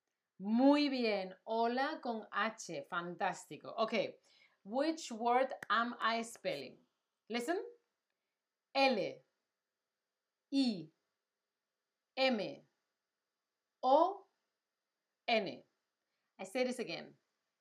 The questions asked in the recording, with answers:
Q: Which word am I spelling?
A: It's not lemon, it's limon, okay?